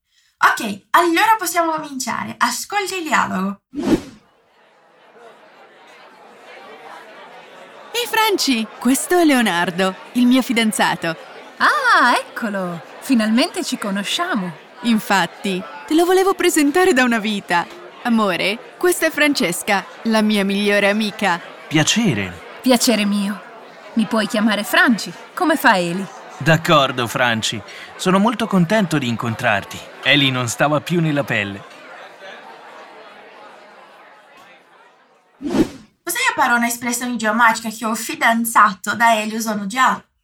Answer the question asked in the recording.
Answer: Em italiano, essa ideia pode ser transmitida com a expressão idiomática non stare più nella pelle.